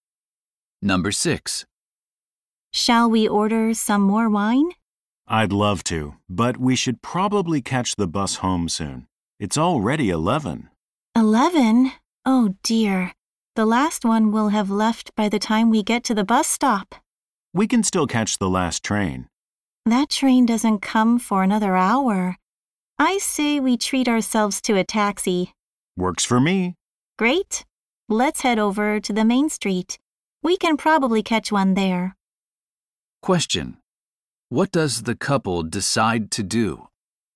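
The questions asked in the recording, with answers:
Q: What does the couple decide to do?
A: Take a taxi home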